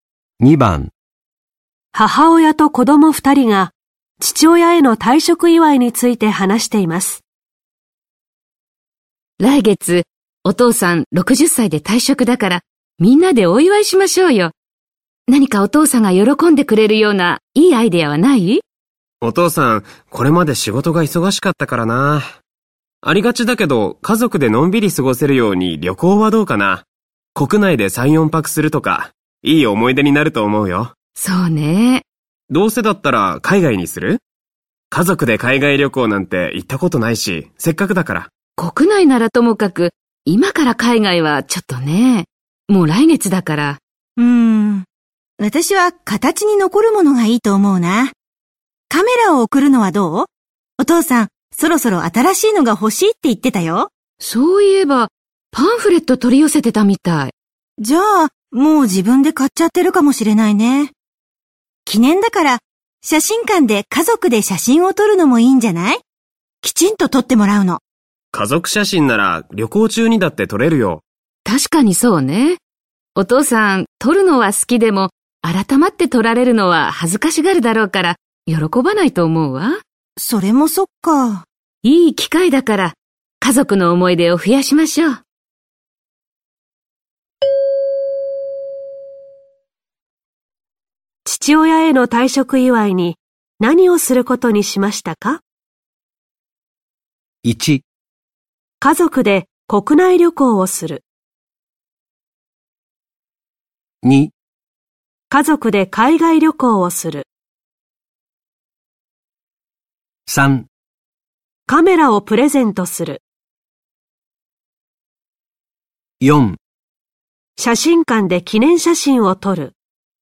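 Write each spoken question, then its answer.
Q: 父親への退職祝いに何をすることにしましたか?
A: 1: 家族で国内旅行をする。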